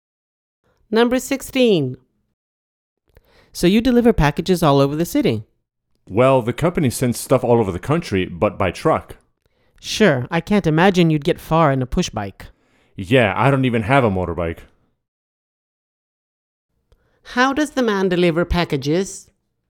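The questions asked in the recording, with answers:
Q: How does the man deliver packages?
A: By truck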